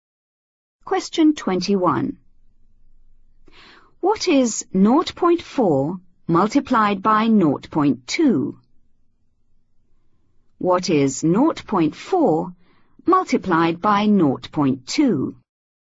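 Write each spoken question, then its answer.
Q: What is 0.4 multiplied by 0.2?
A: 0.08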